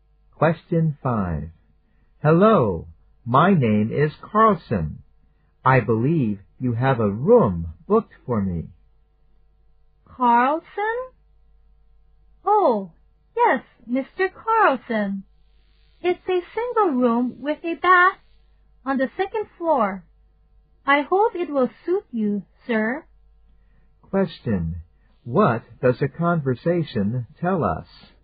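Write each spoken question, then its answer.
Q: What does the conversation tell us?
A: Mr. Carlson has booked a single room with a bath on the second floor of a hotel.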